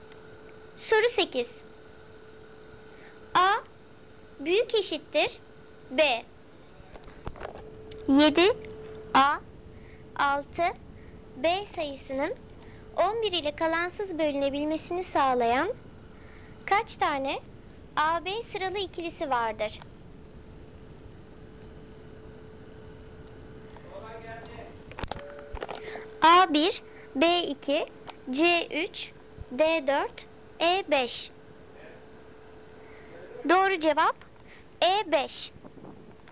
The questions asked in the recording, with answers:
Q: 7 A 6 B sayısının 11 ile kalansız bölünebilmesini sağlayan kaç tane AB sıralı ikilisi vardır?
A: Doğru cevap E5.